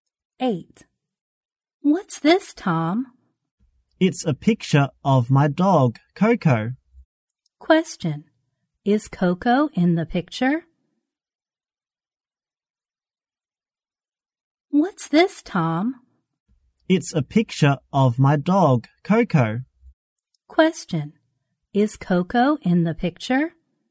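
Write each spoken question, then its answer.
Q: Is Coco in the picture?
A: Yes, it is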